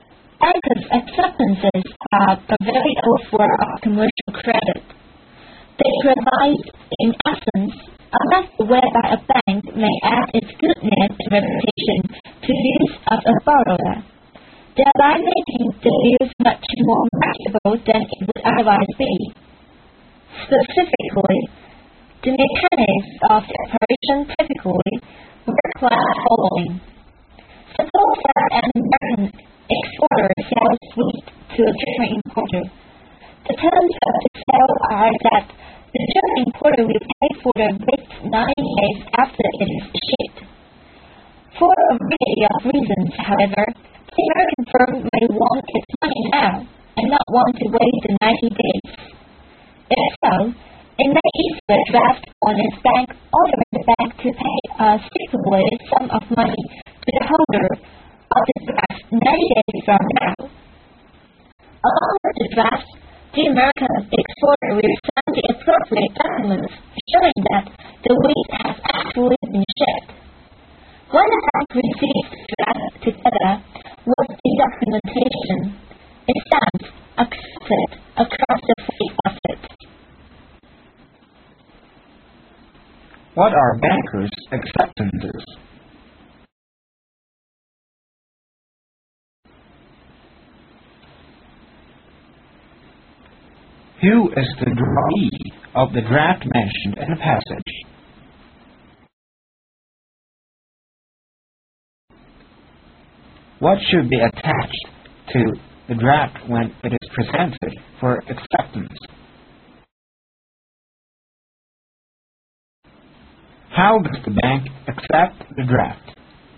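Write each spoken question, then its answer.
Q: What are bankers' acceptances?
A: A means for a bank to lend its name and reputation to a borrower's IOUs, making them more marketable (used in commercial credit)

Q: Who is the drawee of the draft mentioned in the passage?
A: The American exporter's bank

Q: What should be attached to the draft when it is presented for acceptance?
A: Documents showing that the wheat has actually been shipped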